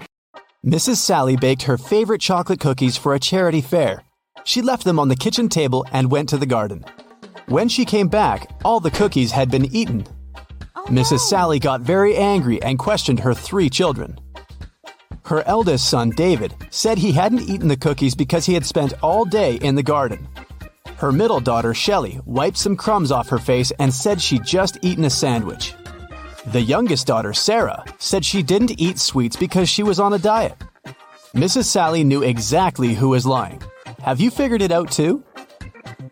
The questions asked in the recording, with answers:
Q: Have you figured it out too?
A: It was David.